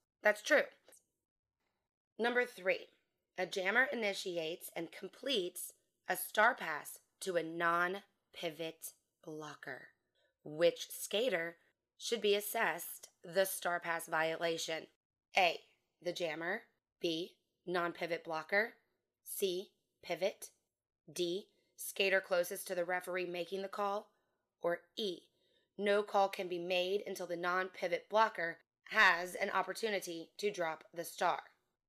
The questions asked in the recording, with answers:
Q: Which skater should be assessed the star pass violation?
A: The answer is E, no call should be made until the non-pivot blocker has an opportunity to drop the star.